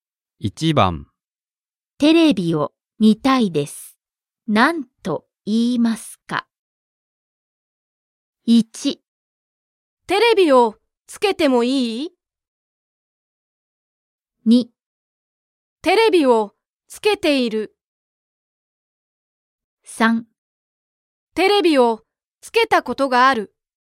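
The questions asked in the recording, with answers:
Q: テレビを見たいです。何と言いますか?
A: 1: テレビをつけてもいい?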